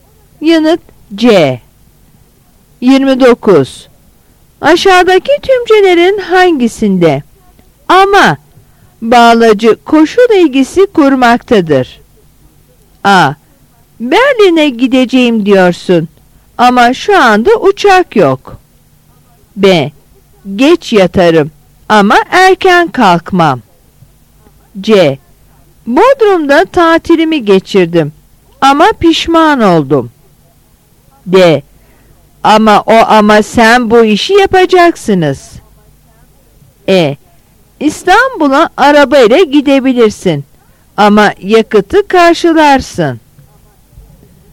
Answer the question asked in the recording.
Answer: Yanıt E.